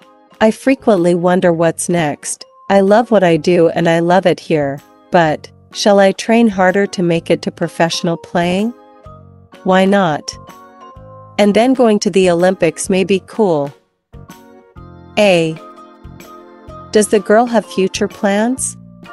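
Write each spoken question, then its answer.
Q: Does the girl have future plans?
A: Yes, maybe to play professionally and go to the Olympics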